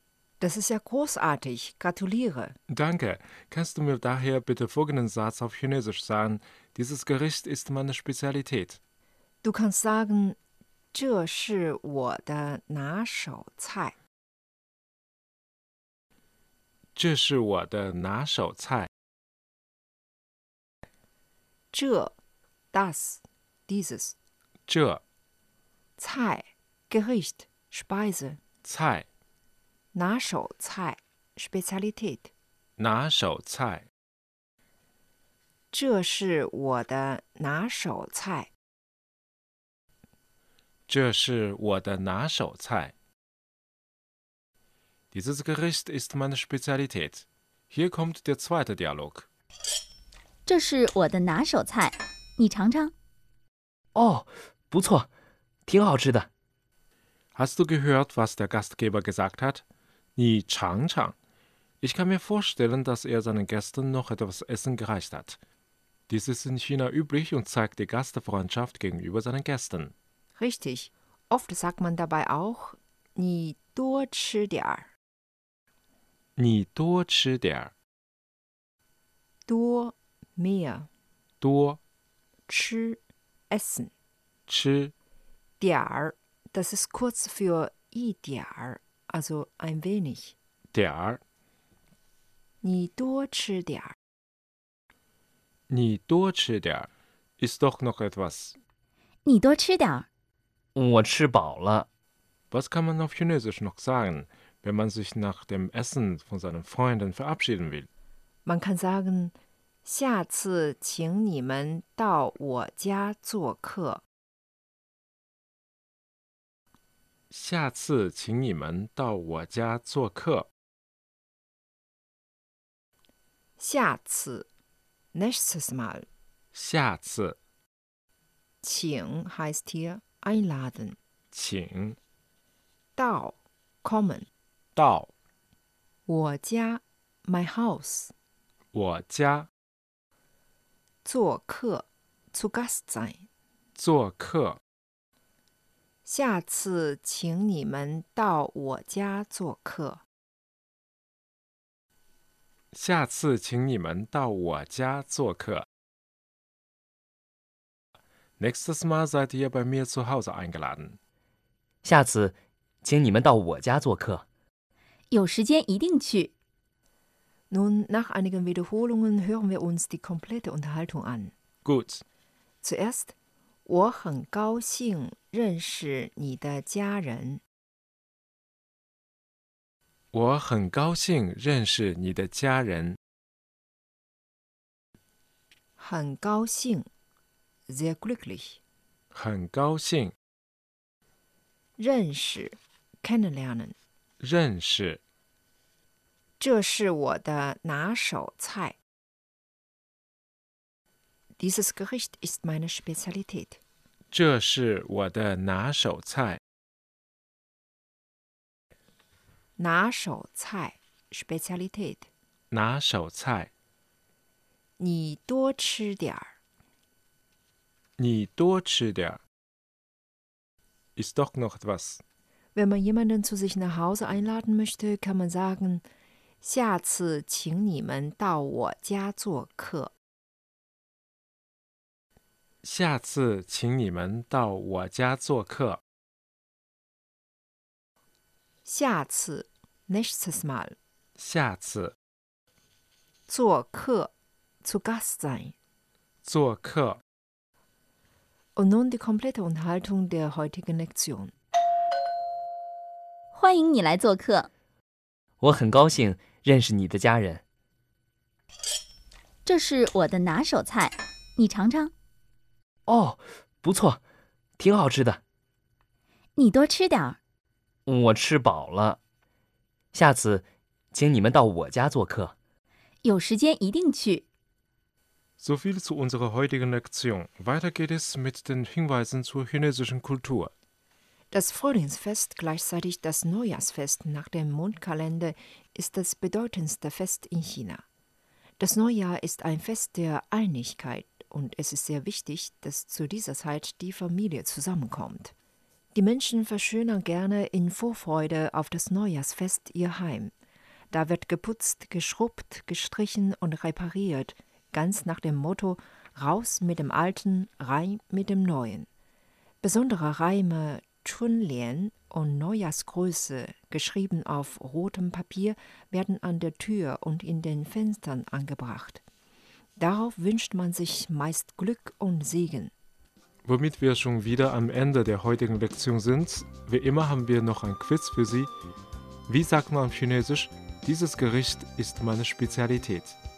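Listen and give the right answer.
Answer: 这是我的拿手菜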